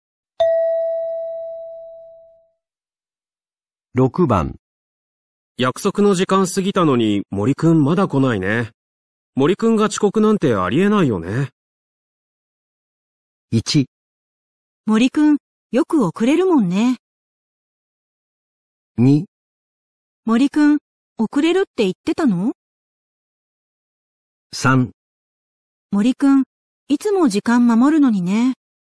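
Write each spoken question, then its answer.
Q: 約束の時間過ぎたのに森くんまだ来ないね。森くんが遅刻なんてありえないよね。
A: 3: 森くんいつも時間守るのにね。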